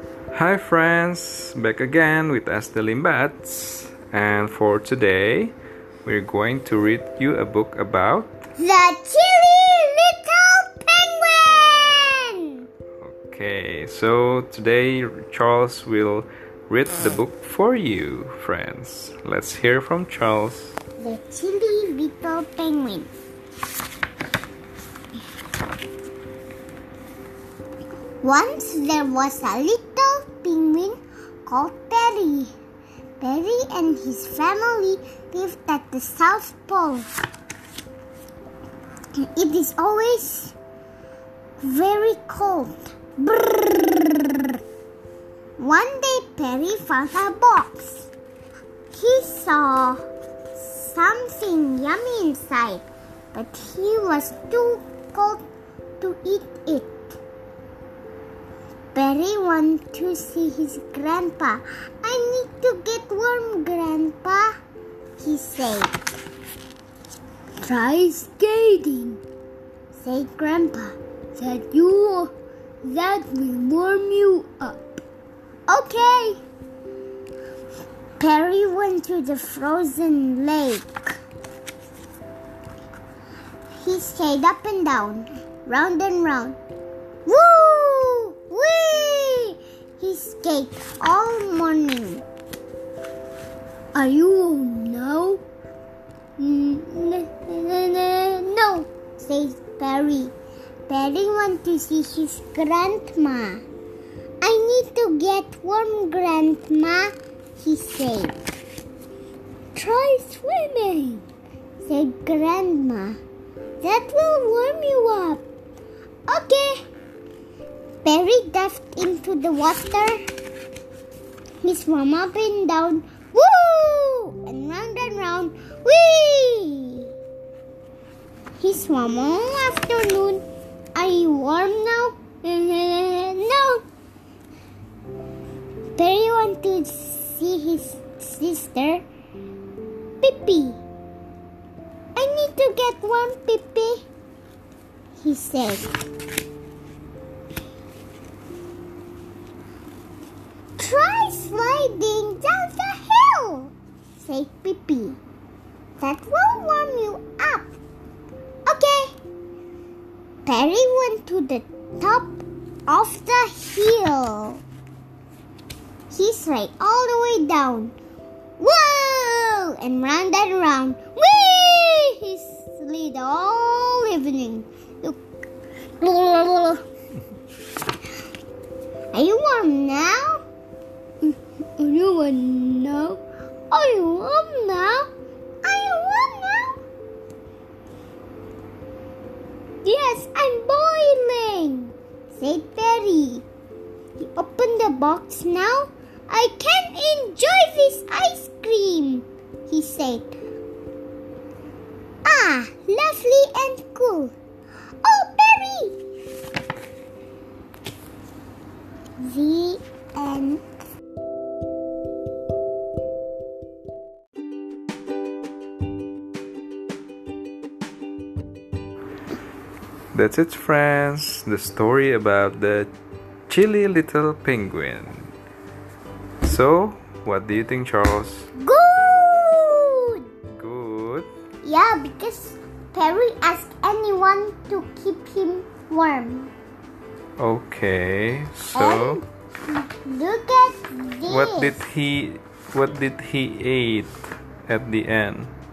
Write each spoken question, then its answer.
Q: What did he eat at the end?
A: He ate ice cream.